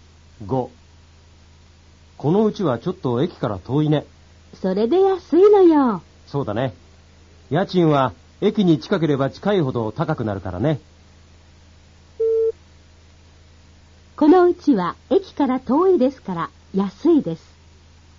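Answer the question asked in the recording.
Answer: 正しい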